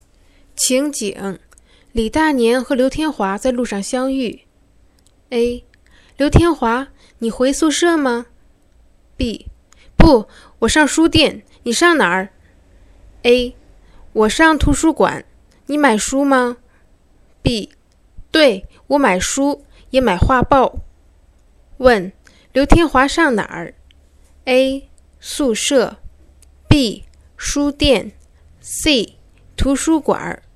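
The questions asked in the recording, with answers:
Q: 刘天华上哪儿?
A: B: 书店。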